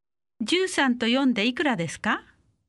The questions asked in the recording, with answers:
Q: 13と4でいくらですか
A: 17